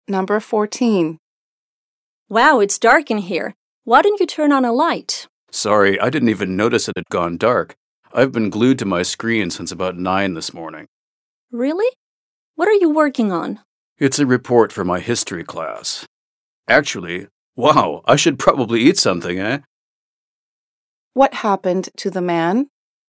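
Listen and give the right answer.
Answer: He lost track of time working on his history report and didn't notice it had gone dark.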